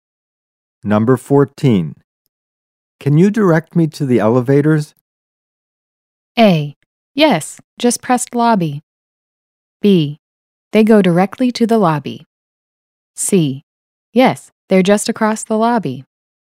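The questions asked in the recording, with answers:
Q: Can you direct me to the elevators?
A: C: Yes, they're just across the lobby.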